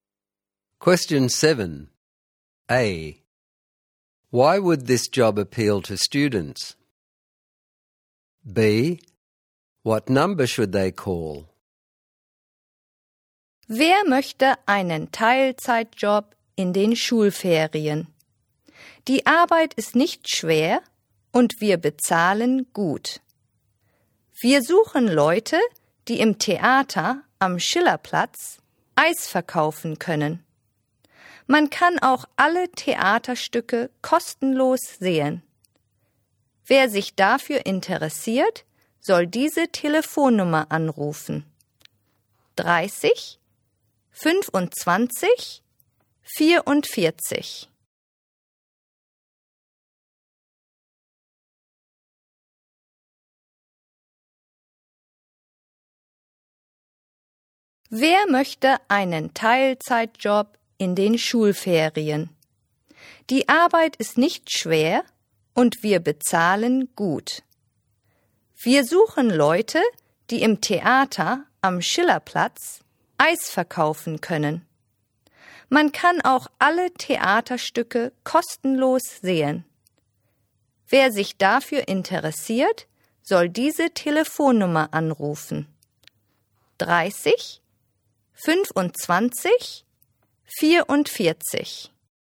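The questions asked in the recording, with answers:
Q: A. Why would this job appeal to students?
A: Part-time in the school holidays, work not hard, good pay, can see all plays free

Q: B. What number should they call?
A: 30 25 44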